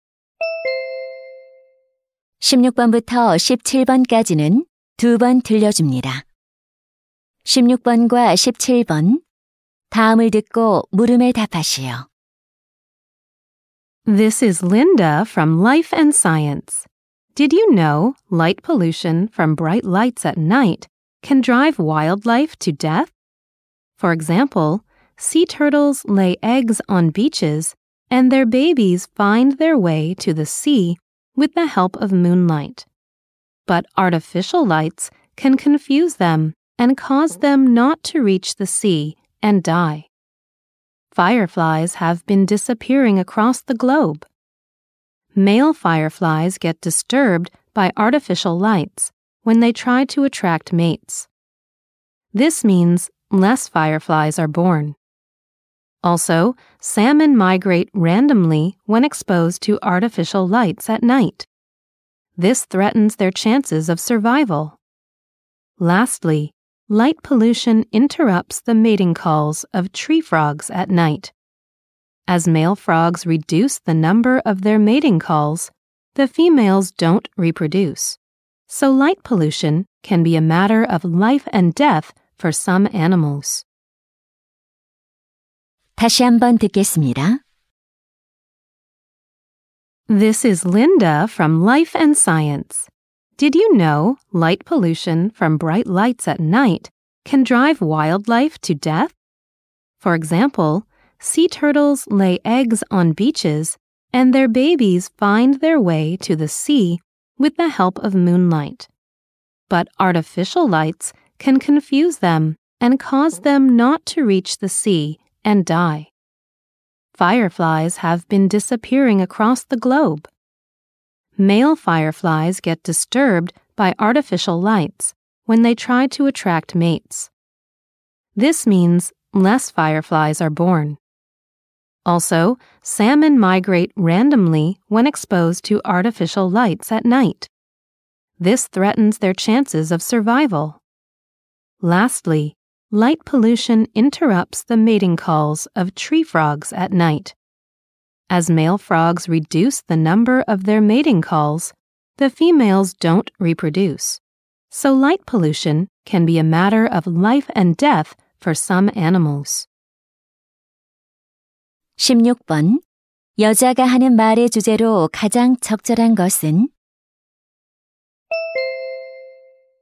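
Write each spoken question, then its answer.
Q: 여자가 하는 말의 주제로 가장 적절한 것은?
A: 빛 공해가 야생 동물에 미치는 악영향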